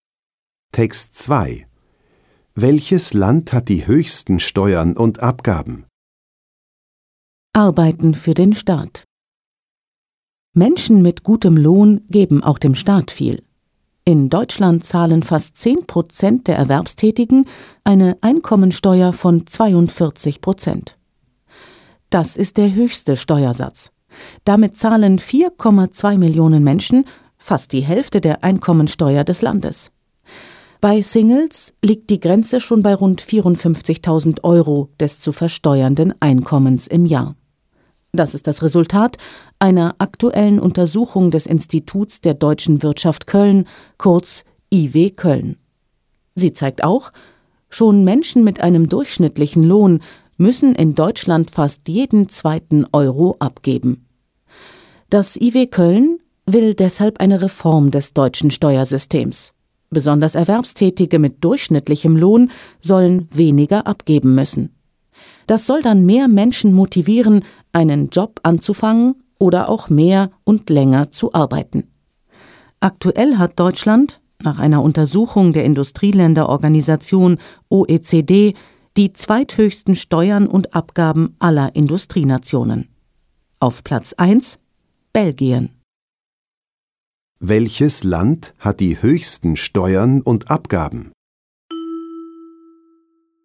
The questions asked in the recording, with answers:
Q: Welches Land hat die höchsten Steuern und Abgaben?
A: Belgien.